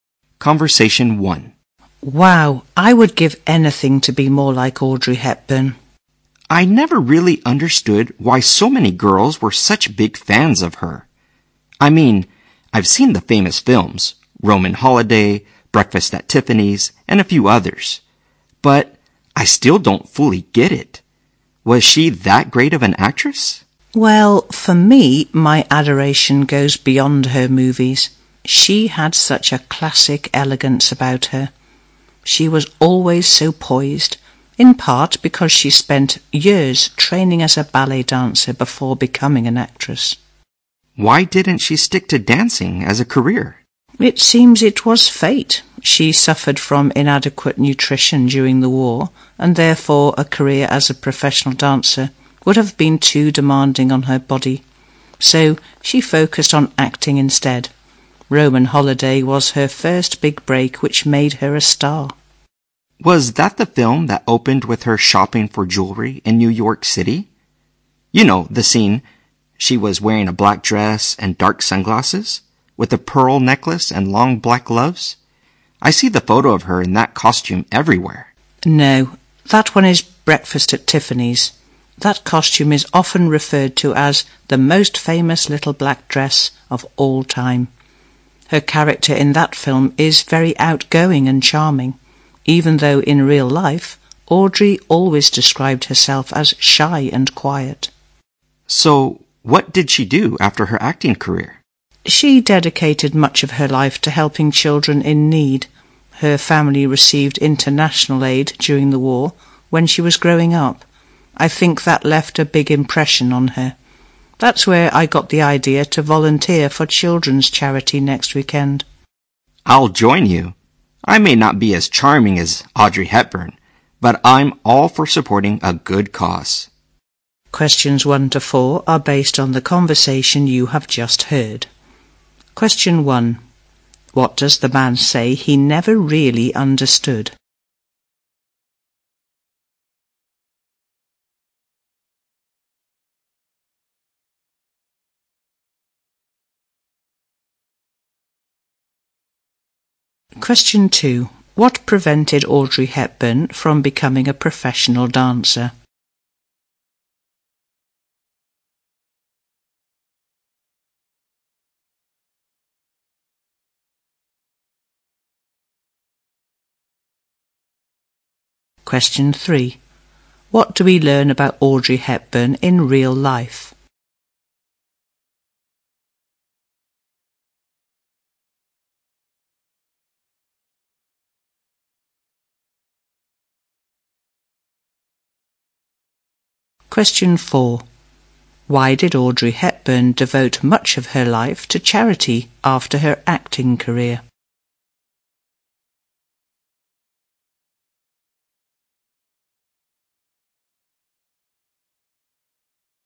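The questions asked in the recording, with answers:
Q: What does the man say he never really understood?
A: Why so many girls were such big fans of Audrey Hepburn

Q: What prevented Audrey Hepburn from becoming a professional dancer?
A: Inadequate nutrition during the war made dancing too demanding on her body

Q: What do we learn about Audrey Hepburn in real life?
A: She described herself as shy and quiet

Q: Why did Audrey Hepburn devote much of her life to charity after her acting career?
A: Her family received international aid during the war when she was growing up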